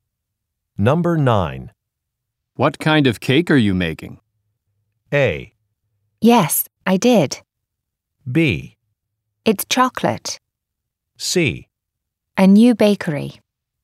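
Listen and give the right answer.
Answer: B: It's chocolate.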